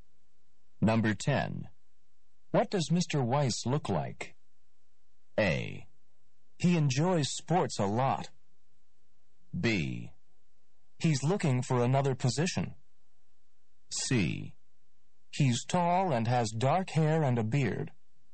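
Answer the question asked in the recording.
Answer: C: He's tall and has dark hair and a beard.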